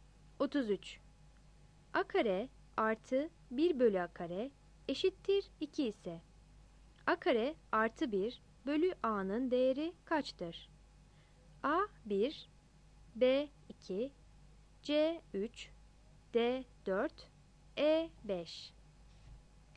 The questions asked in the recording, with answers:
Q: A kare artı 1 bölü A kare eşittir 2 ise, A kare artı 1 bölü A'nın değeri kaçtır?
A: 33 B